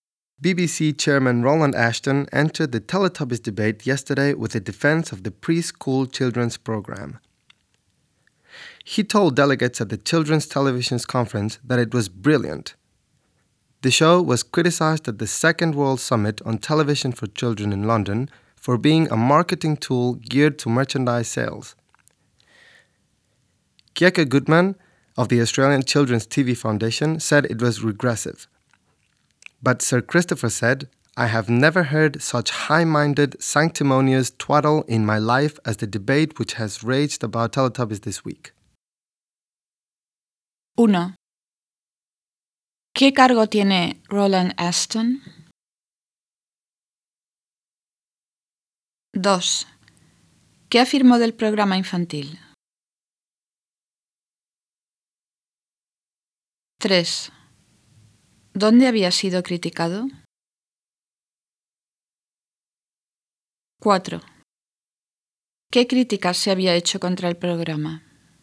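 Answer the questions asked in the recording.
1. Presidente de la BBC
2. Que era brillante
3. En la Segunda Cumbre Mundial sobre Televisión para Niños, en Londres
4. Que era una herramienta de marketing orientada a la venta de productos y que era regresivo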